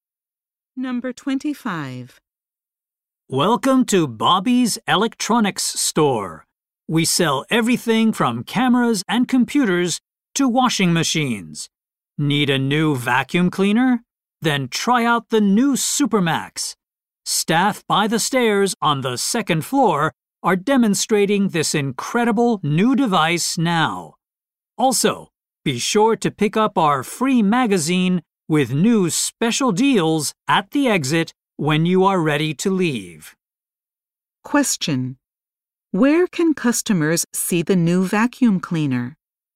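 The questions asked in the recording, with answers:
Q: Where can customers see the new vacuum cleaner?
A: By the stairs on the second floor.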